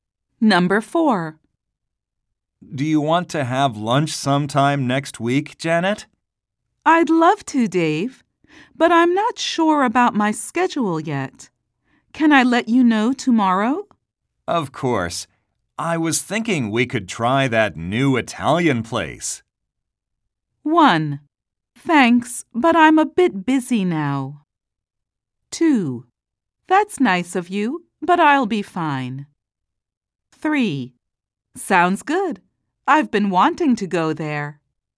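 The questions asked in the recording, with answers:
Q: I was thinking we could try that new Italian place.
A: 3: Sounds good. I've been wanting to go there.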